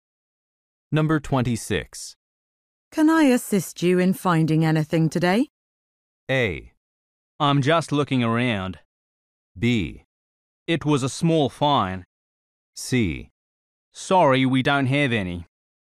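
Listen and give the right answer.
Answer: A: I'm just looking around.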